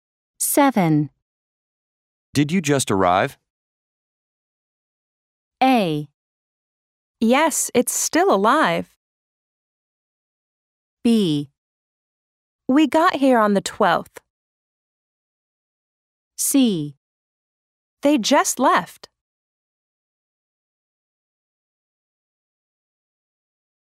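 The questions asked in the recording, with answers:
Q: Did you just arrive?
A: B: We got here on the 12th.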